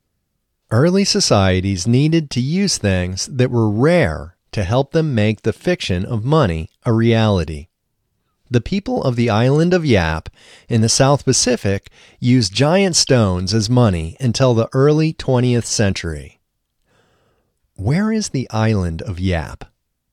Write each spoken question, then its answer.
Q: Where is the island of Yap?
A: The island of Yap is in the South Pacific.